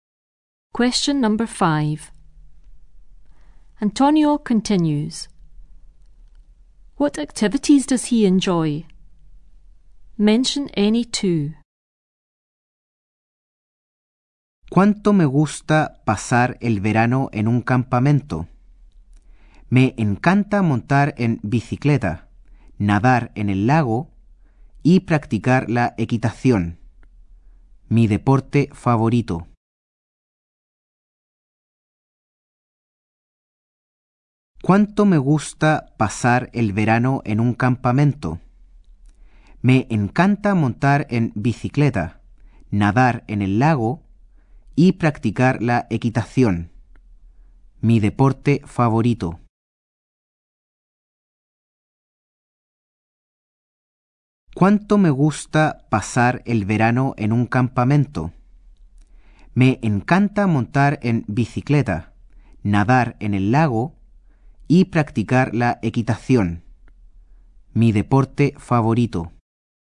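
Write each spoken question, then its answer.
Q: What activities does he enjoy?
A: Any two: cycling, swimming in the lake, horse riding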